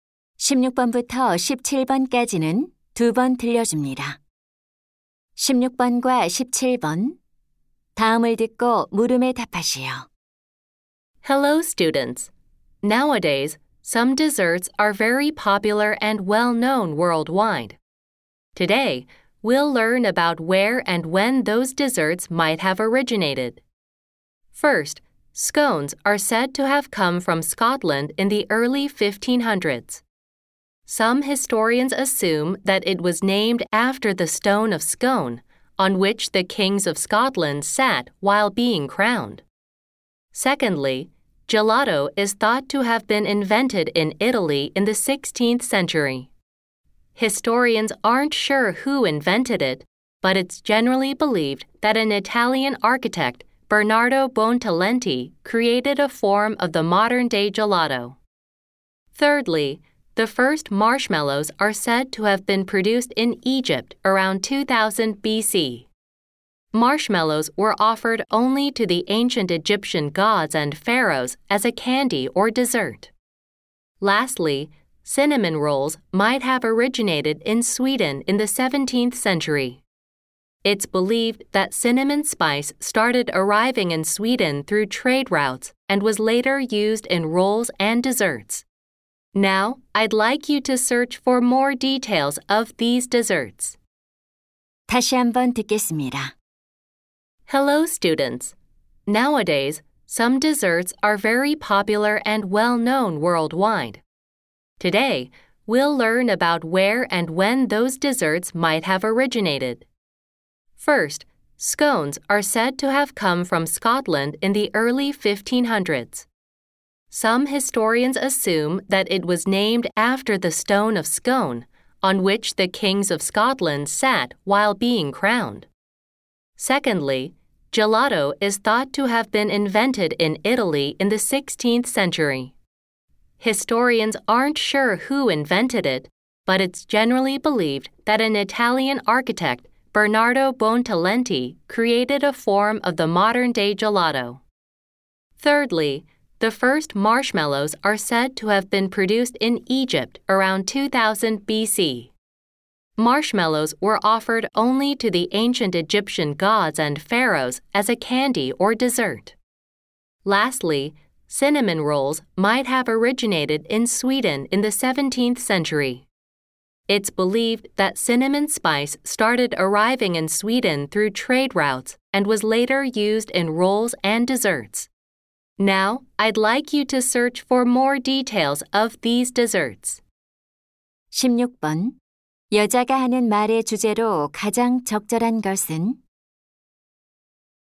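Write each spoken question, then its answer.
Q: 여자가 하는 말의 주제로 가장 적절한 것은?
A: 유명한 디저트들의 기원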